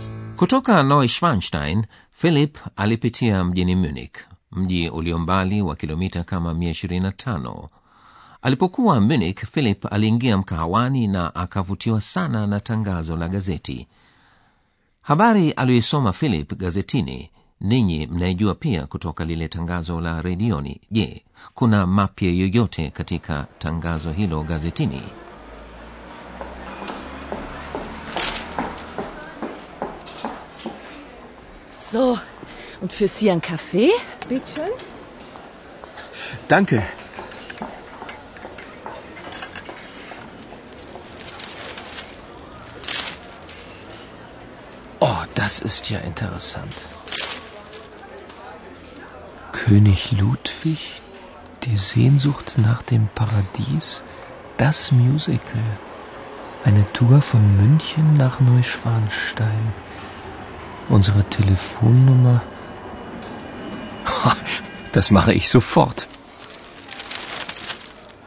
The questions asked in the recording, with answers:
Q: je kuna mapya yoyote katika tangazo hilo gazetini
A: habari mpya ni kwamba kutokea munich huandaliwa safari za kwenda kuizuru kasri neuschwanstein